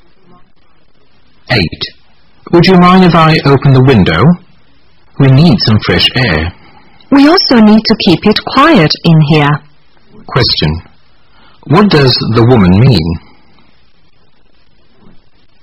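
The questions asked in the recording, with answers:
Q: What does the woman mean?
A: She would rather keep the window closed because of the noise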